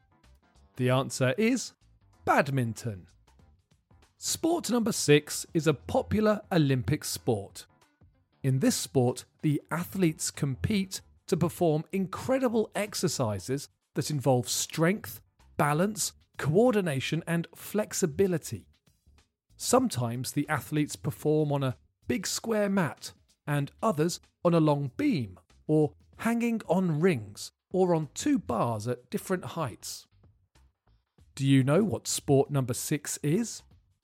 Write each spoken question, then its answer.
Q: Do you know what sport number six is?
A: The answer is gymnastics.